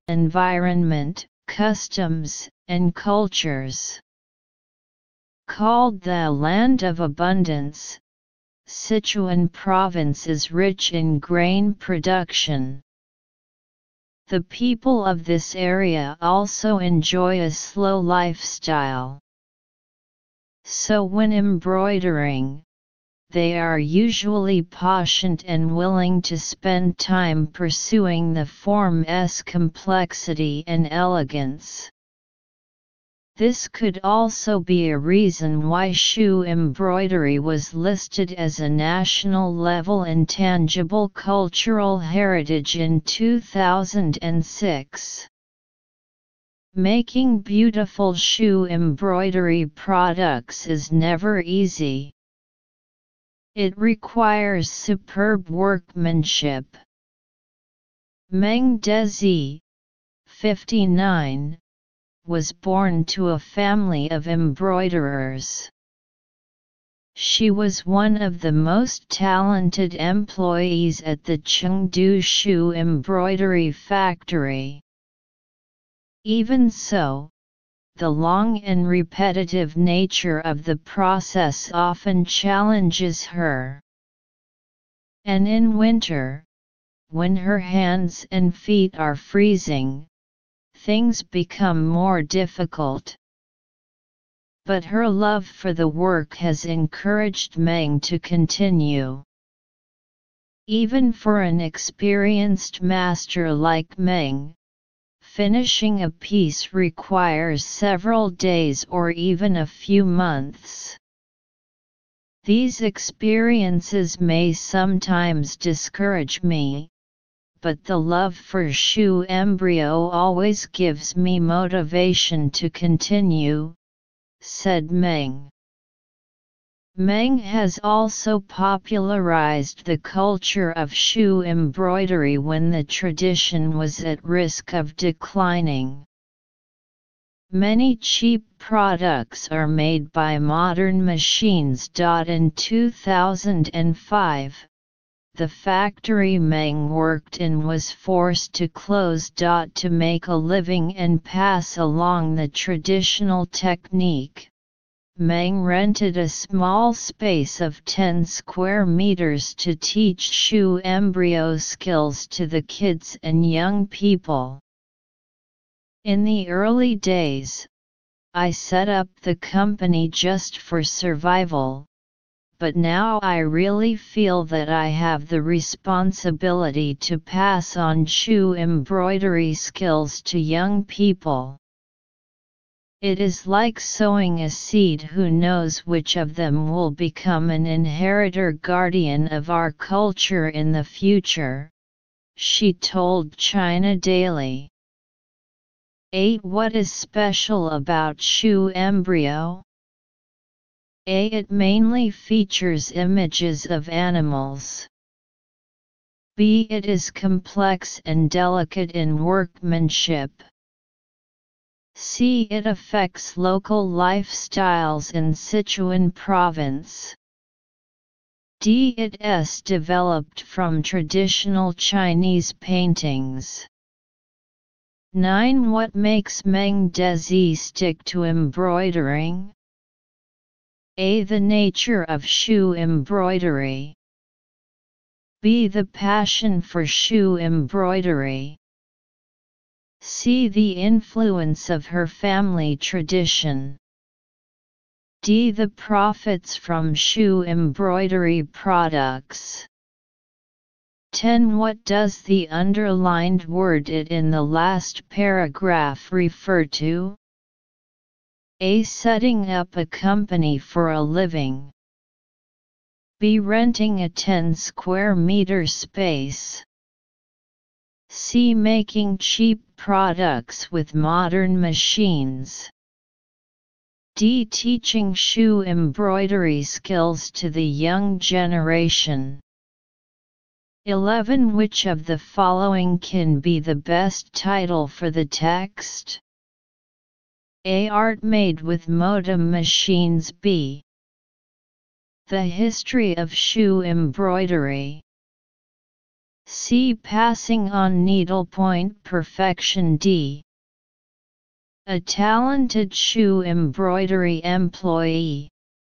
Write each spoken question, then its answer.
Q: What is special about shoe embroidery?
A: 8. B.

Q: What makes Meng Dezi stick to embroidering?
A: 9. B.

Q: What does the underlined word it in the last paragraph refer to?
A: 10. D.

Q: Which of the following can be the best title for the text?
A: 11. C.